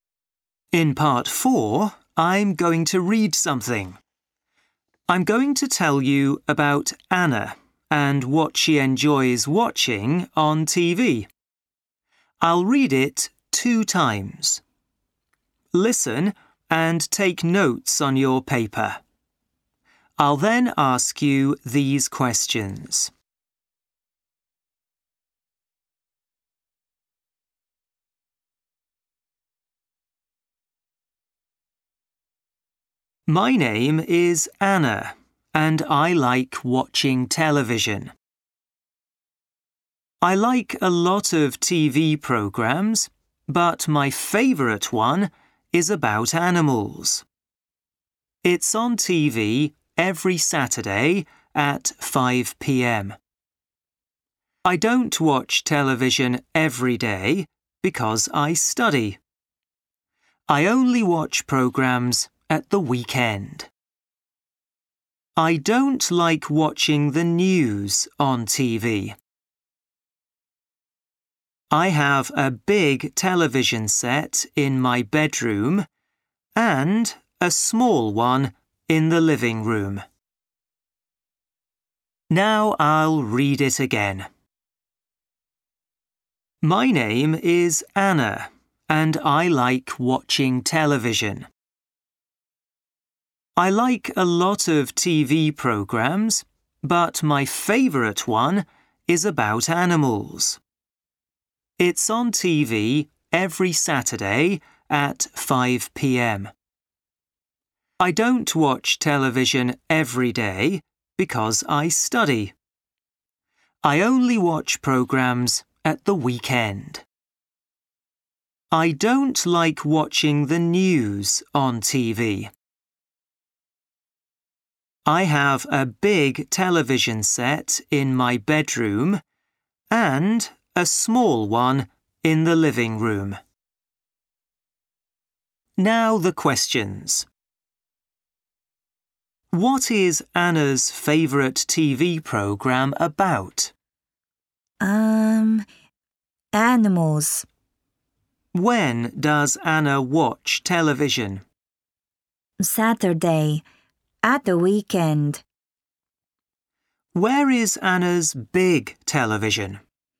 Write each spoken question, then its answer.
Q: What is Anna's favorite TV program about?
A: Animals.

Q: Where is Anna's big television?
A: In my bedroom. No, her bedroom.